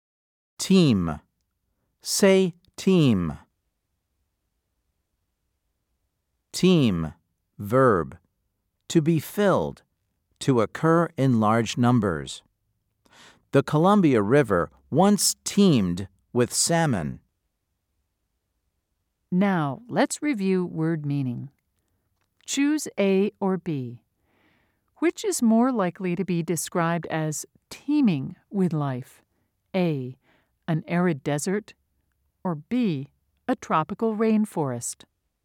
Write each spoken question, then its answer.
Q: Choose A or B. Which is more likely to be described as teeming with life?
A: If you said B, you are correct.